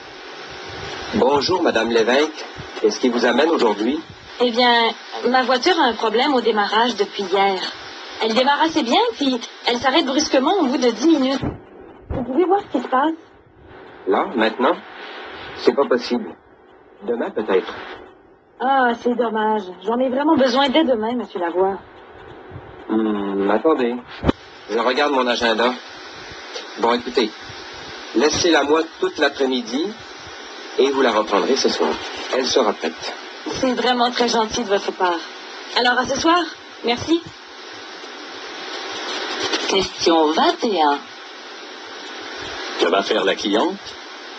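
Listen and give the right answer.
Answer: Laisser sa voiture au garage tout l'après-midi et la reprendre ce soir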